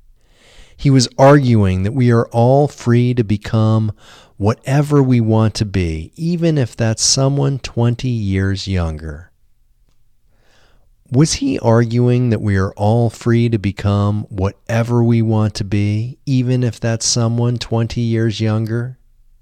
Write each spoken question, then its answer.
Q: Was he arguing that we are all free to become whatever we want to be, even if that's someone 20 years younger?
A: Yes, he was arguing that we are all free to become whatever we want to be, even if that's someone 20 years younger.